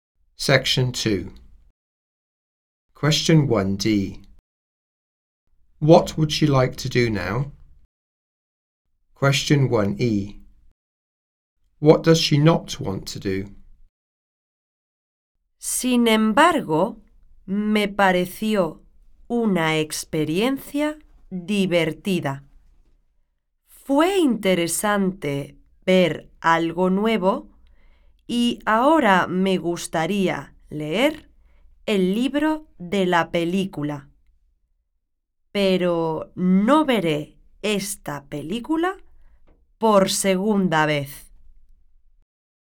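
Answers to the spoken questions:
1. Read the book of the film
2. See the film a second time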